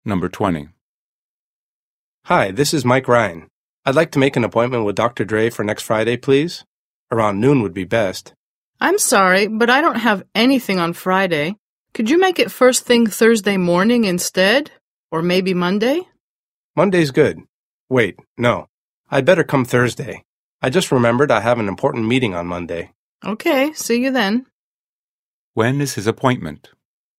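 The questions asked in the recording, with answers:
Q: When is his appointment?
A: Thursday morning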